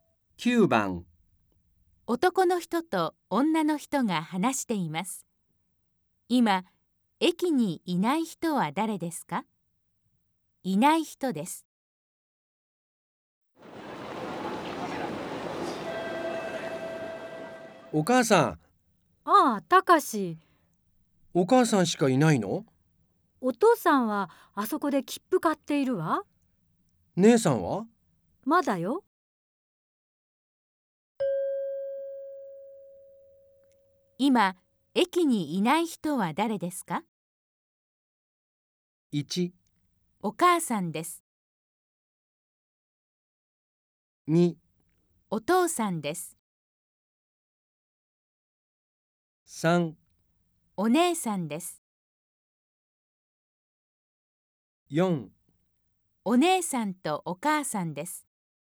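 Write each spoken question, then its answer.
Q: 今、駅にいない人は誰ですか?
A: 3: お姉さんです。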